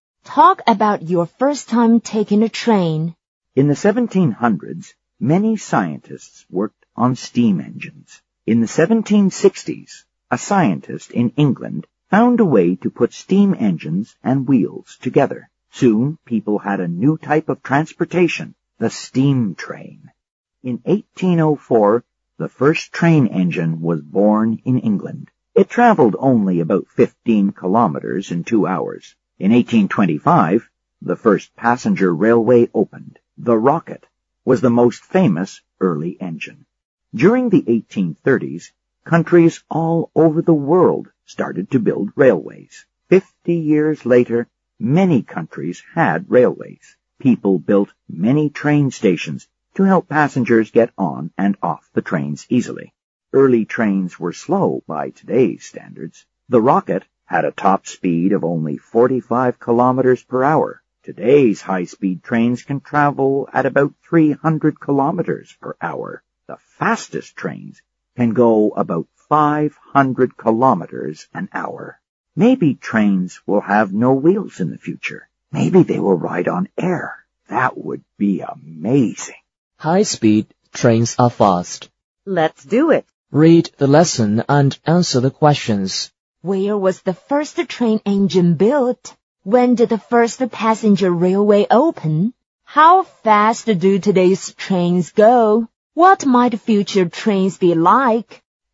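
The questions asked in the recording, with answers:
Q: Where was the first train engine built?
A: In England

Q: When did the first passenger railway open?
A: In 1825

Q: How fast do today's trains go?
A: About 300 kilometers per hour

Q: What might future trains be like?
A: They might have no wheels and ride on air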